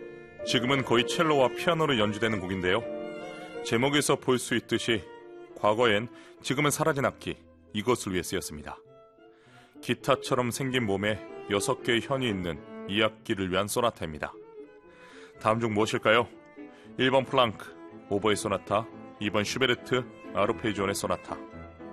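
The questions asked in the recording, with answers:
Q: 다음 중 무엇일까요? 1번 플랑크, 오버의 소나타, 2번 슈베르트, 아르페지온의 소나타.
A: 2번: 슈베르트, 아르페지온의 소나타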